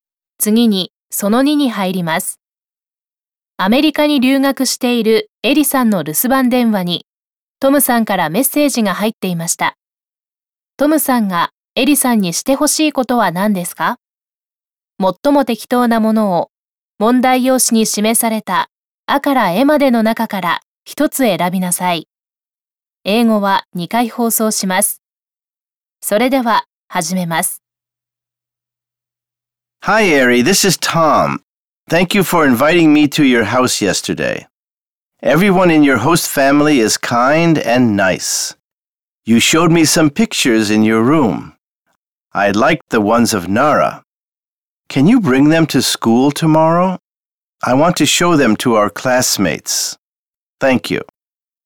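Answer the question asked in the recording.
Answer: 奈良の写真を明日学校に持ってくること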